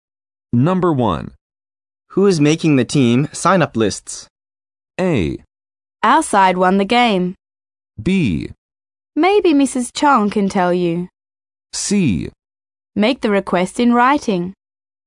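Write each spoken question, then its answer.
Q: Who is making the team sign-up lists?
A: B: Maybe Mrs. Chong can tell you.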